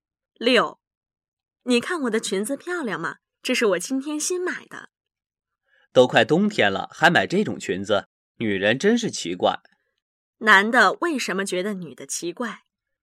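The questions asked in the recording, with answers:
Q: 男的为什么觉得女的奇怪?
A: 快冬天了还买裙子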